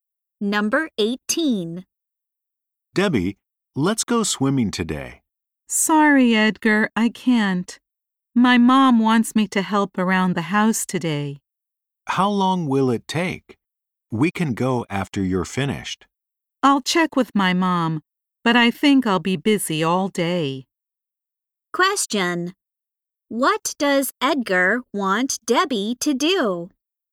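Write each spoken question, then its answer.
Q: What does Edgar want Debbie to do?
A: Go swimming with him.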